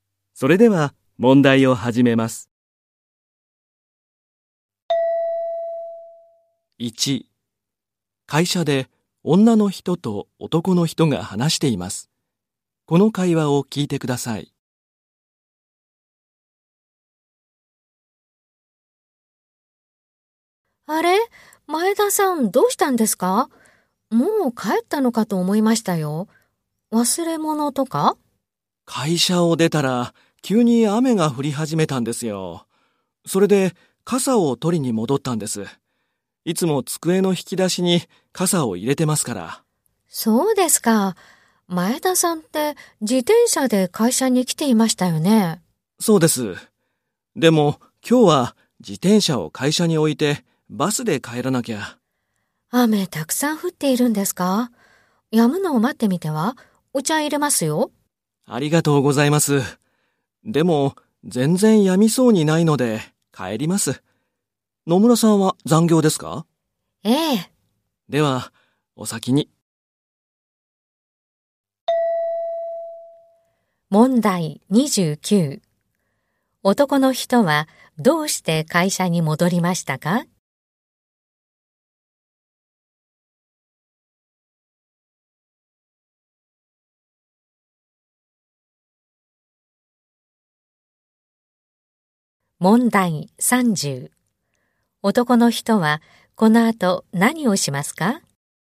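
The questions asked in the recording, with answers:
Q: 男の人はどうして会社に戻りましたか?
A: 傘を取りに戻った

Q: 男の人はこの後何をしますか?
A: バスで帰る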